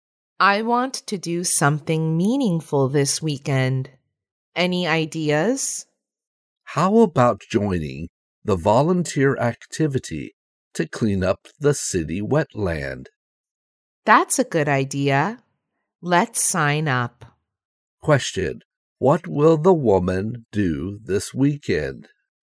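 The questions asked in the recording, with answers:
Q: What will the woman do this weekend?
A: Join the volunteer activity to clean up the city wetland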